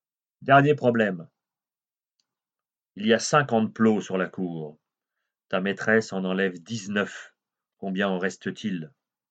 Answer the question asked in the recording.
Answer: Il en reste 31.